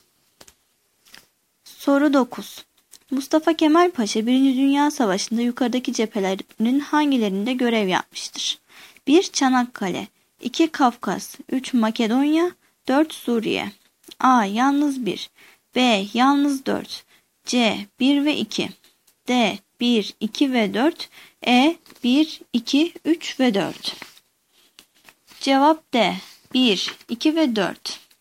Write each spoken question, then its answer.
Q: Dünya Savaşı'nda yukarıdaki cephelerin hangilerinde görev yapmıştır?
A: Cevap D. 1, 2 ve 4.